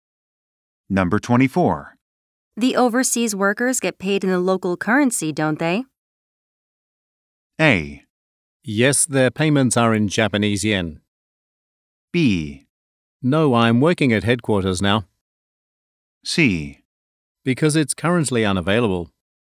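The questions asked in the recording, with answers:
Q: The overseas workers get paid in the local currency, don't they?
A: A: Yes, their payments are in Japanese yen.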